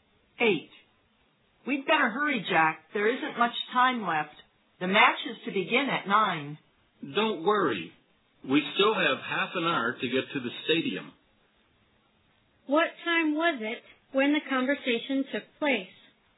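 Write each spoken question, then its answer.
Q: What time was it when the conversation took place?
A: 8:30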